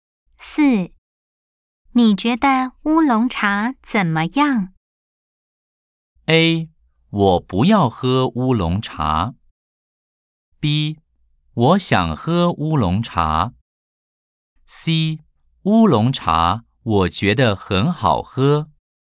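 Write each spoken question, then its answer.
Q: 你觉得乌龙茶怎么样?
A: C: 乌龙茶我觉得很好喝。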